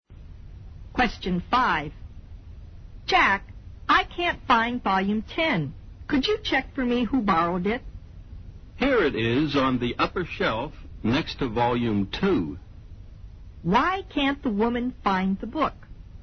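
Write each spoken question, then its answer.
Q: Why can't the woman find the book?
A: It was put in the wrong place, on the upper shelf next to volume 2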